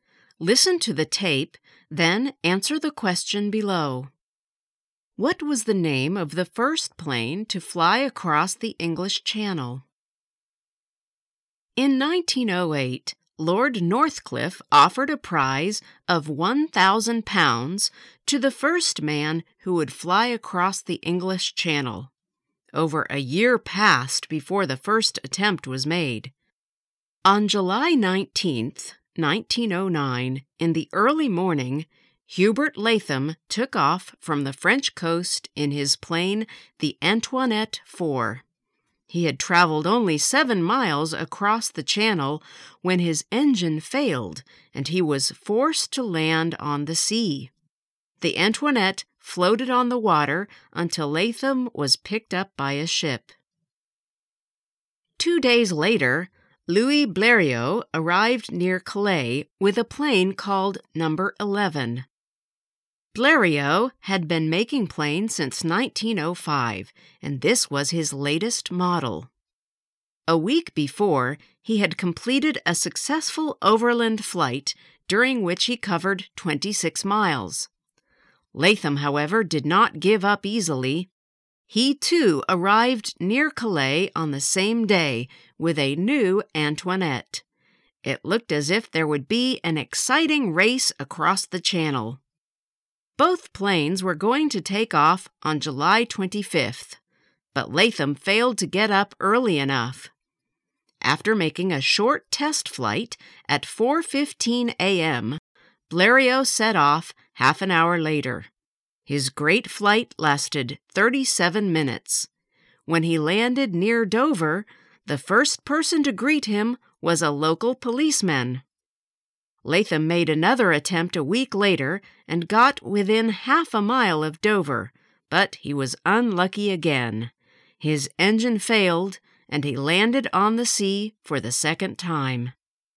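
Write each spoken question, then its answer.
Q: What was the name of the first plane to fly across the English Channel?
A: No. 11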